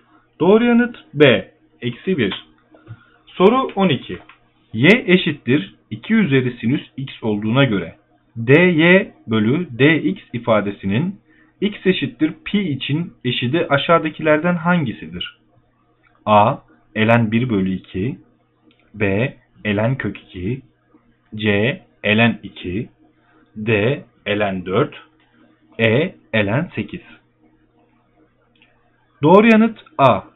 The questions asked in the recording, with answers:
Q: Y eşittir 2 üzeri sinüs x olduğuna göre dy bölü dx ifadesinin x eşittir pi için eşidi aşağıdakilerden hangisidir?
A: Doğru yanıt A.